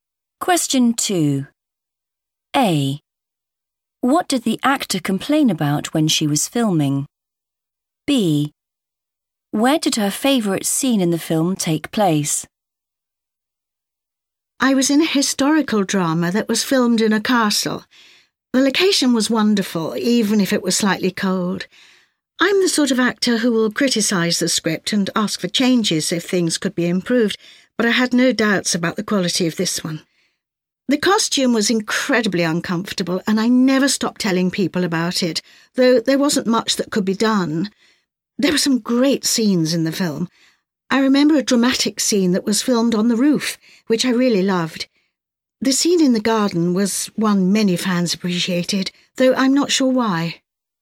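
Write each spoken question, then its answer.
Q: What did the actor complain about when she was filming?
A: the costume

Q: Where did her favourite scene in the film take place?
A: on the roof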